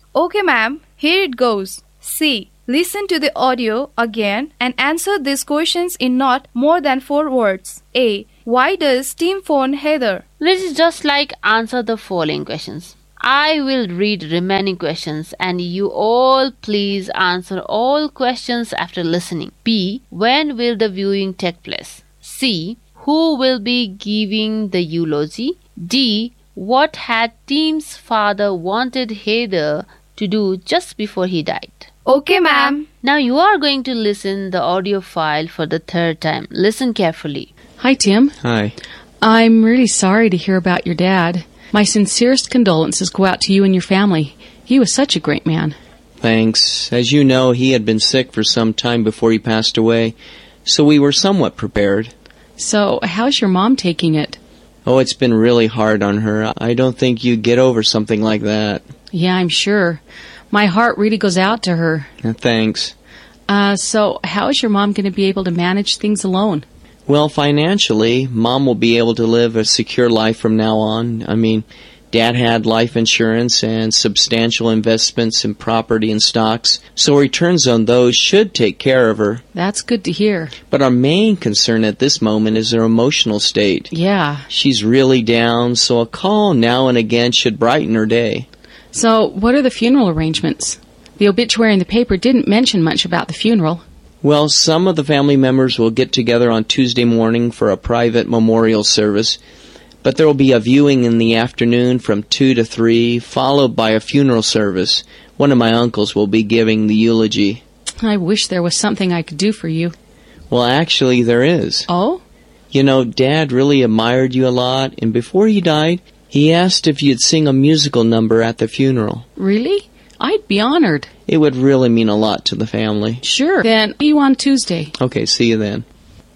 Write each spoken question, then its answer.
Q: Who will be giving the eulogy?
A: The answer of number C is, one of Tim's uncle will be giving eulogy.

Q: What had Tim's father wanted Heather to do just before he died?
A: That is, Tim's father wanted Heathers to sing a song in his funeral.